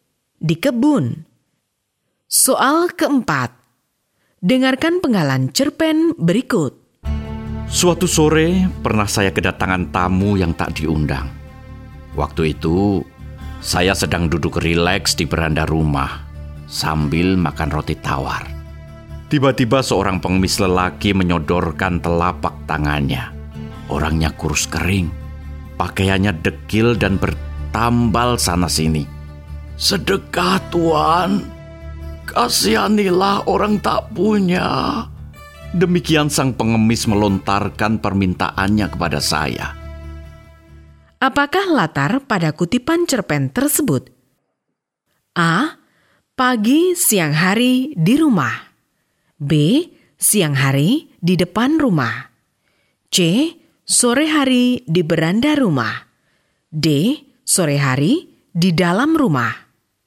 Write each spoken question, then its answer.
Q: Apakah latar pada kutipan cerpen tersebut?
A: Jawaban yang benar adalah C. Sore hari di beranda rumah.